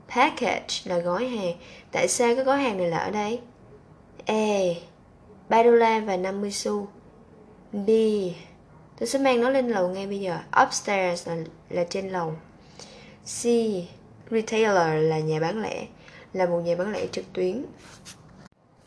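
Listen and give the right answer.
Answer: B: Tôi sẽ mang nó lên lầu ngay bây giờ.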